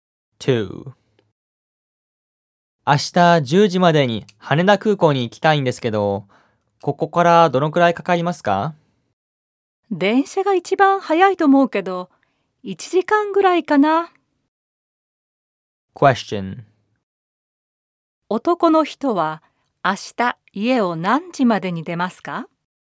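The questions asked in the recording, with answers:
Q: 男の人は明日家を何時までに出ますか?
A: 9時までに出るはずです。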